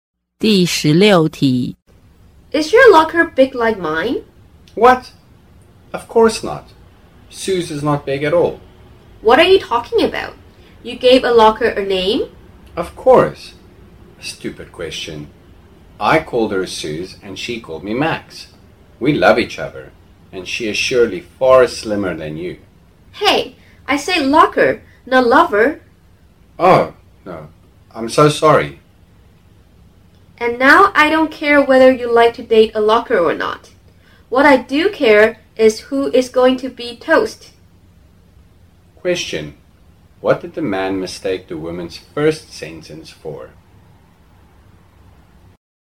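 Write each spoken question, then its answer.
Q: What did the man mistake the woman's first sentence for?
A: Is your lover big like mine?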